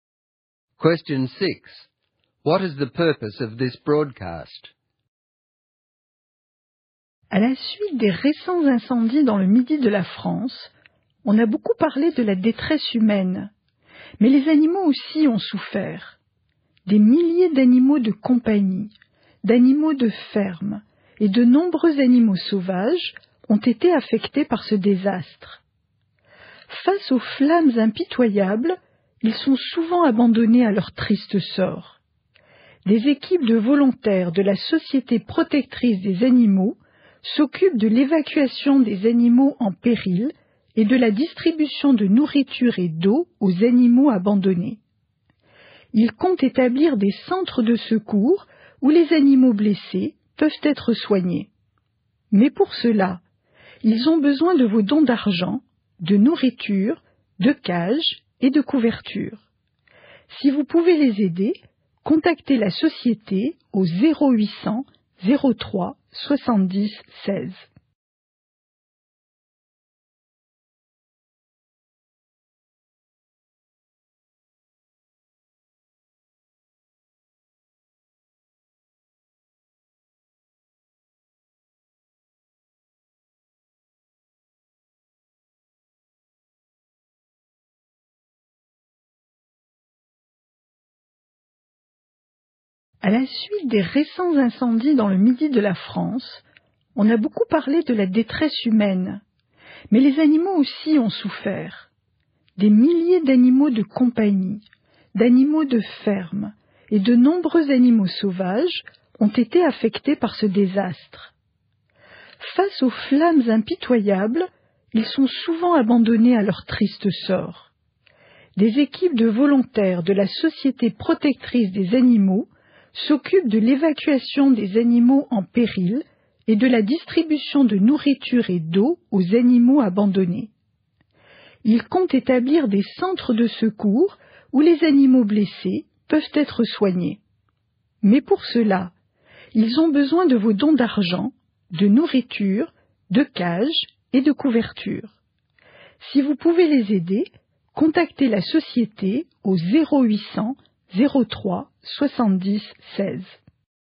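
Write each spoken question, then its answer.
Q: What is the purpose of this broadcast?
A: To ask for donations of money, food, cages and blankets to help animals affected by the fires in southern France.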